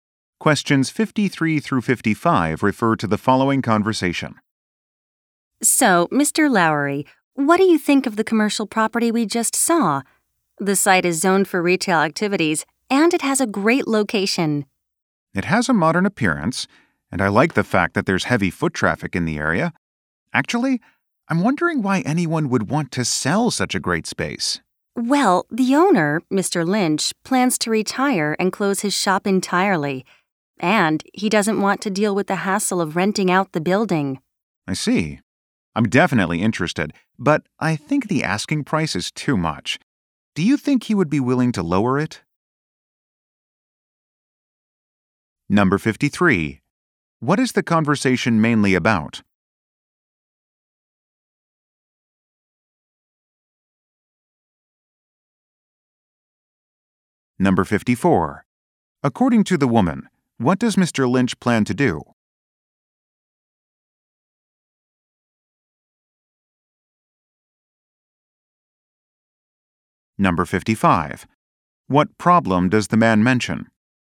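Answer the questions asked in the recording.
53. A commercial property for sale
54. Retire and close his shop
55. The asking price is too high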